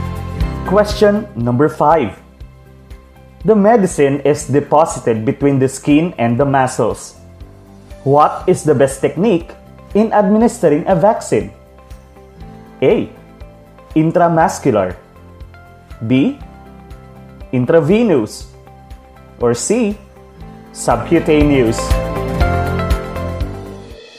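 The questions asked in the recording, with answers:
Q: What is the best technique in administering a vaccine?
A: C: Subcutaneous.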